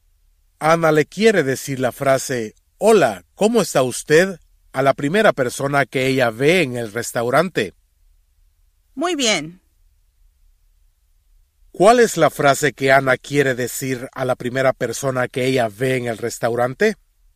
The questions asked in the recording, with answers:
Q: ¿Cuál es la frase que Ana quiere decir a la primera persona que ella ve en el restaurante?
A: Ana le va a decir, hola, ¿cómo está usted? A la primera persona que ella ve en el restaurante.